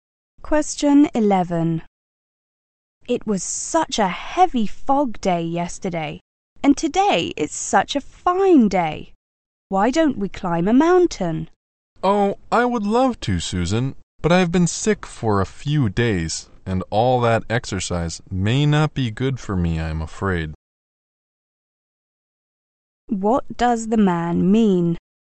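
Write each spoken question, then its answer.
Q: What does the man mean?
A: He can't go climbing because he has been sick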